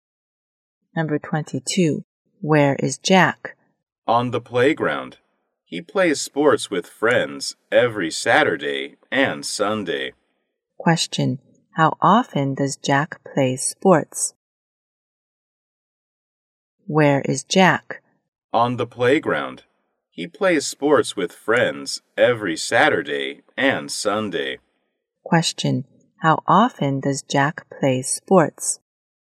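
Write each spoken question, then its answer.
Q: How often does Jack play sports?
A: Every weekend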